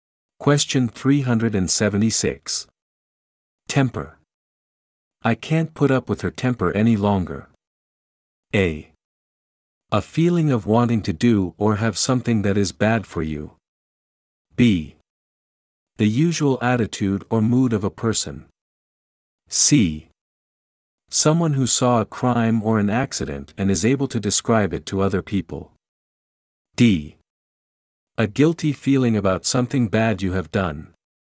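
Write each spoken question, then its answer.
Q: Temper. I can't put up with her temper any longer.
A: B: The usual attitude or mood of a person.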